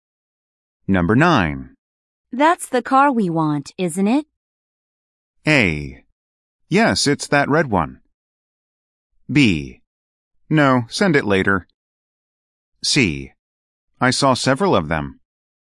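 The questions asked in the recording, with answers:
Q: That's the car we want, isn't it?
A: A: Yes, it's that red one.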